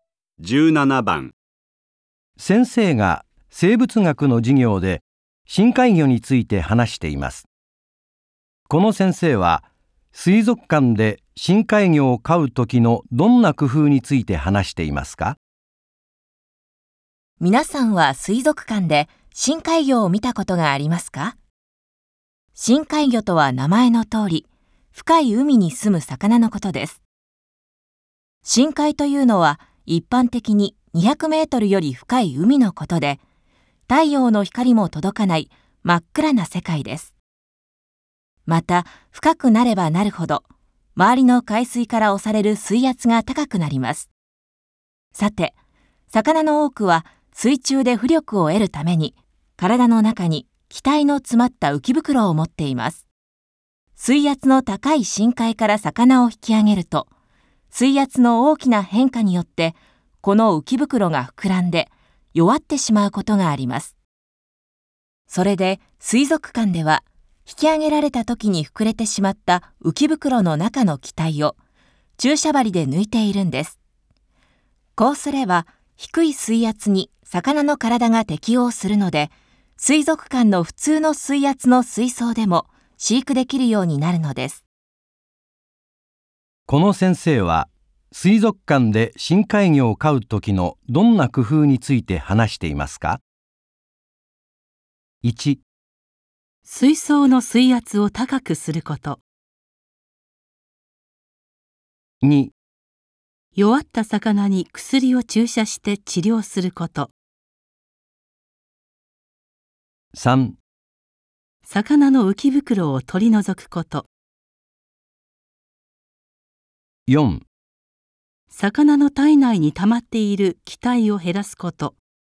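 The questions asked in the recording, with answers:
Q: この先生は水族館で深海魚を飼う時のどんな工夫について話していますか?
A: 4: 魚の体内に溜まっている気体を減らすこと。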